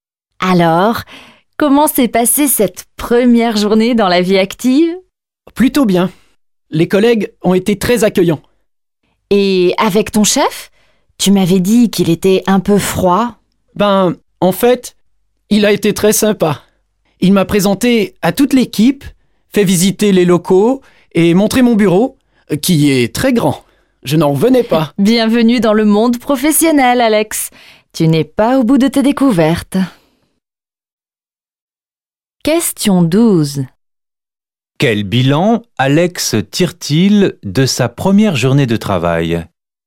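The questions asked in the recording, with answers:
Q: Quel bilan Alex tire-t-il de sa première journée de travail?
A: Un bilan positif : ses collègues l'ont très bien accueilli et son chef a été très sympa.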